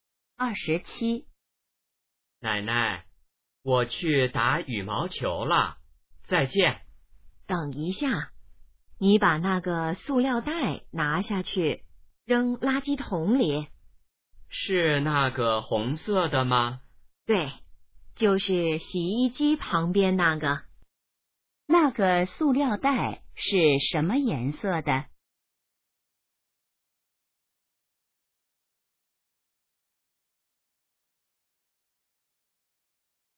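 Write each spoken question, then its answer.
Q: 那个塑料袋是什么颜色的?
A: 红色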